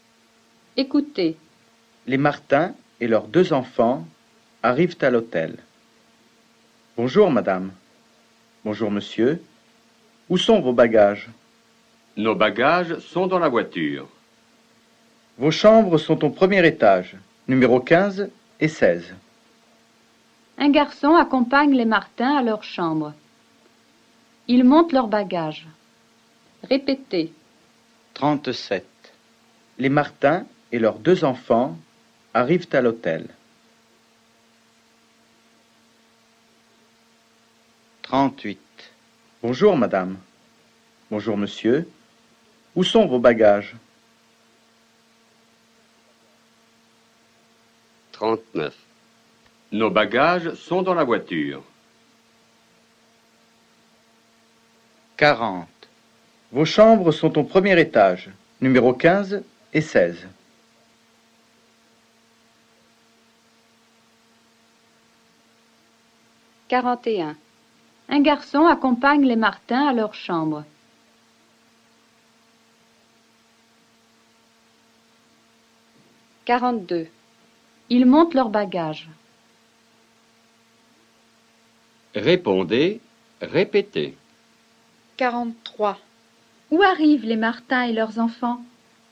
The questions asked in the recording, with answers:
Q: Où arrivent les Martins et leurs enfants?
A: Les Martins et leurs enfants arrivent à l'hôtel.